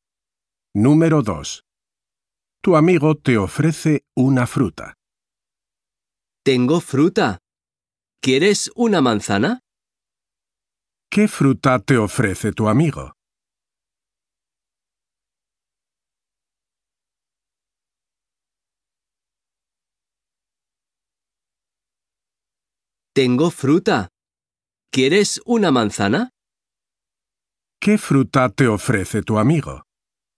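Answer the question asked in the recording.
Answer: Una manzana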